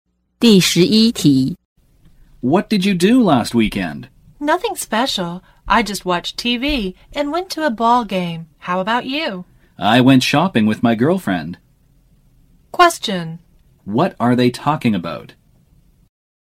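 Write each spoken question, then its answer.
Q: What are they talking about?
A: What they did last weekend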